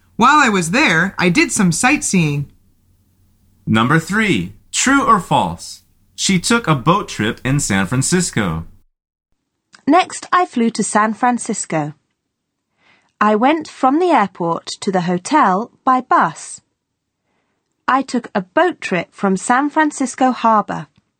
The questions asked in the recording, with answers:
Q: True or false? She took a boat trip in San Francisco.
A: The answer is true.